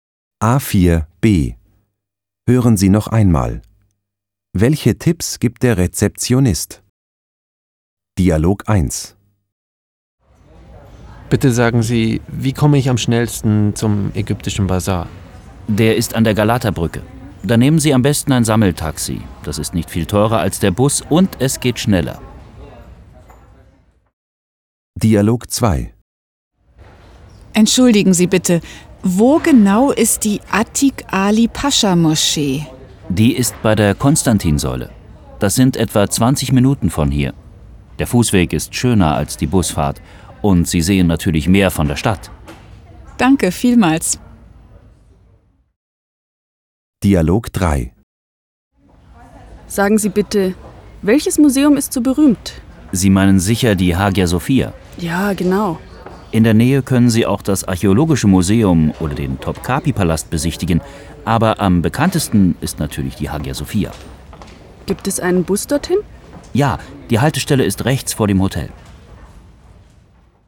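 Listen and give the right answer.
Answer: Dialog 1: ein Sammeltaxi zum Ägyptischen Bazar nehmen (schneller, kaum teurer als der Bus); Dialog 2: zu Fuß zur Atik-Ali-Pascha-Moschee gehen (etwa 20 Minuten, man sieht mehr von der Stadt); Dialog 3: die Hagia Sophia besuchen, in der Nähe auch das Archäologische Museum oder den Topkapi-Palast; die Bushaltestelle ist rechts vor dem Hotel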